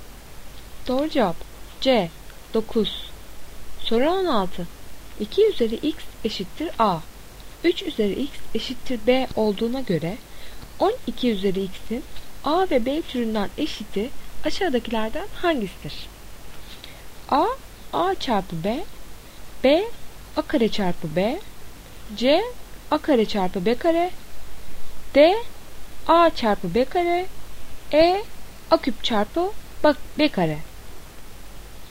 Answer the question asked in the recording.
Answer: Doğru cevap B. A kare çarpı B.